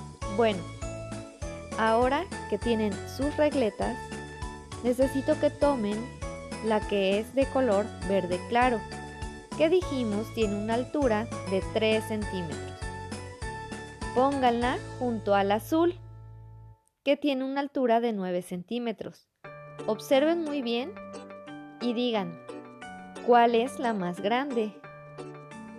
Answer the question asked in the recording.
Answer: Muy bien, espero me hayan dicho la azul, que vale 9, porque 9 es mayor que 3.